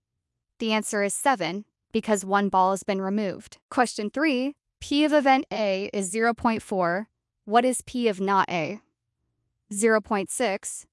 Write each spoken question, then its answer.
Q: What is P of not A?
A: 0.6.